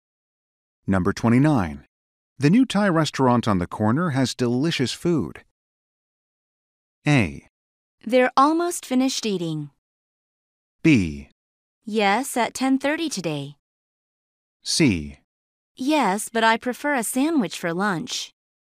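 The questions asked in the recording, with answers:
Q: The new Thai restaurant on the corner has delicious food.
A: C: Yes, but I prefer a sandwich for lunch.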